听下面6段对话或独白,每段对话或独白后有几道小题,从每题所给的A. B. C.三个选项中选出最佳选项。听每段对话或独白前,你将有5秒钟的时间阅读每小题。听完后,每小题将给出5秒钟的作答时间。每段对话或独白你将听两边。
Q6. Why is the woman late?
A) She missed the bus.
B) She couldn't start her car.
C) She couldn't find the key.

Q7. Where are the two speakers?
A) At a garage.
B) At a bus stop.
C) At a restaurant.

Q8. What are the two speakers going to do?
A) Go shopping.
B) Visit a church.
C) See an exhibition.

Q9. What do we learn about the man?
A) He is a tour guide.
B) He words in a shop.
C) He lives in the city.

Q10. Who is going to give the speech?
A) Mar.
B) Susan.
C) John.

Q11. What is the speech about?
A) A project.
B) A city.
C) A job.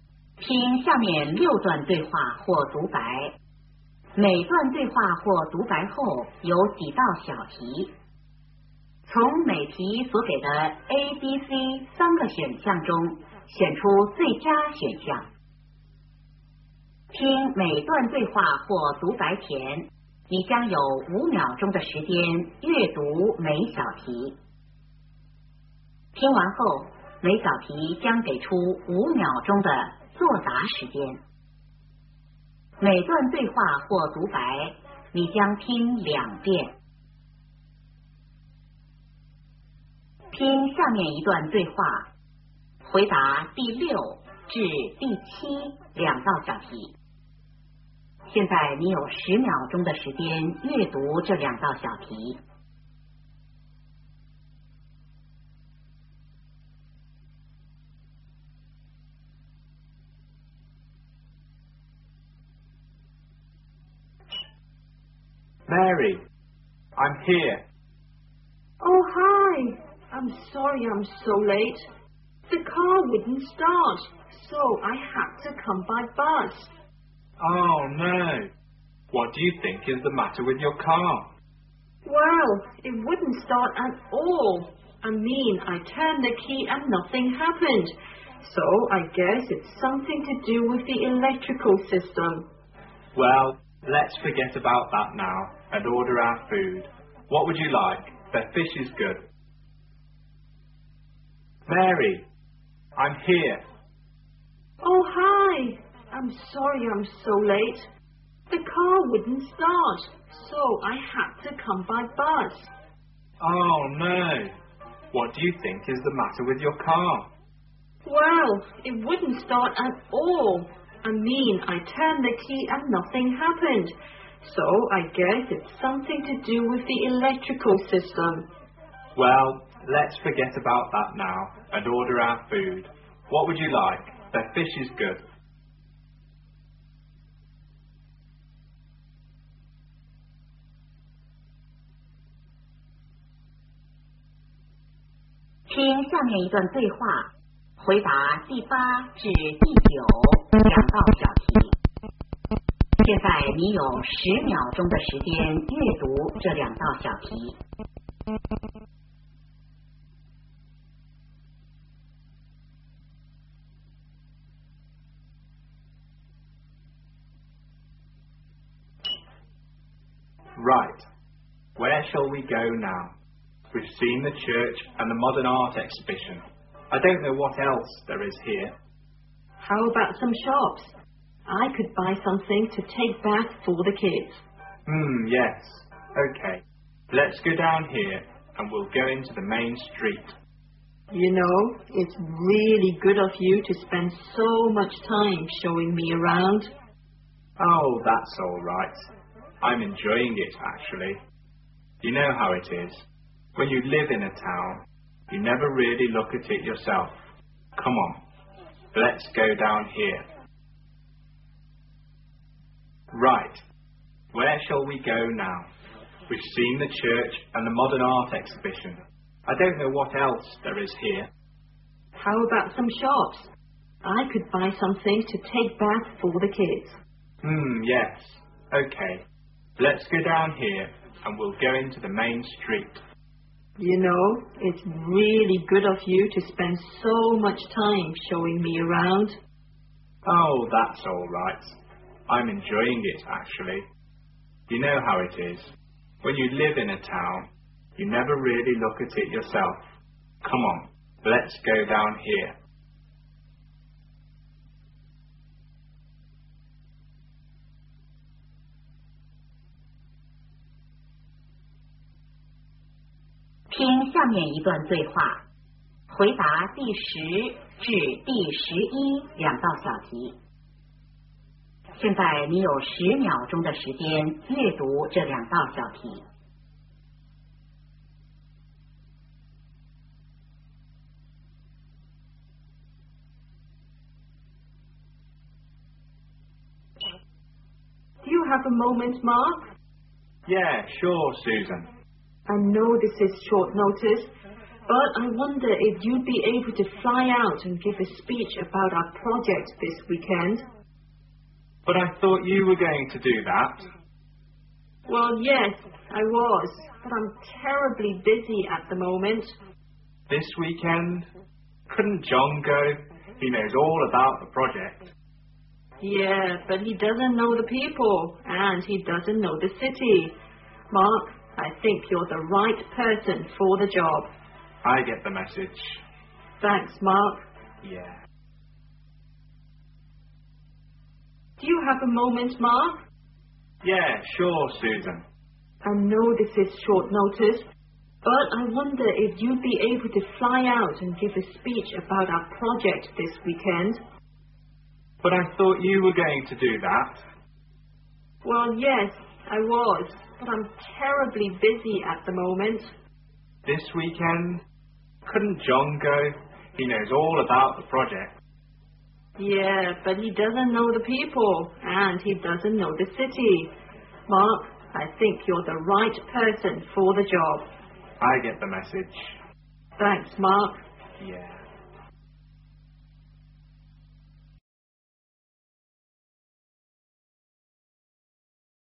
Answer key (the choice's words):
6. She couldn't start her car.
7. At a restaurant.
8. Go shopping.
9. He lives in the city.
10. Mar.
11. A project.

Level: 高考